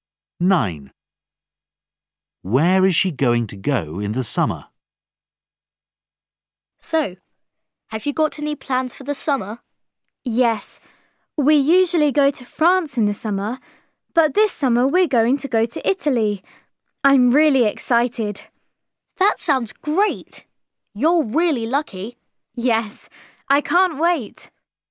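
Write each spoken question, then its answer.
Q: Where is she going to go in the summer?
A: To Italy.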